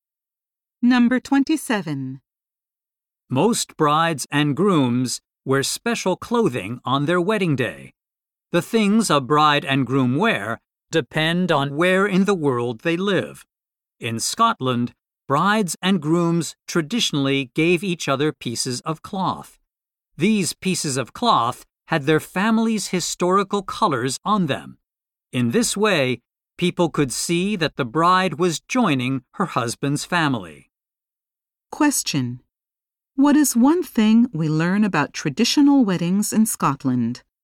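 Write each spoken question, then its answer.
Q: What is one thing we learn about traditional weddings in Scotland?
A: Brides and grooms gave each other pieces of cloth with their family's historical colors.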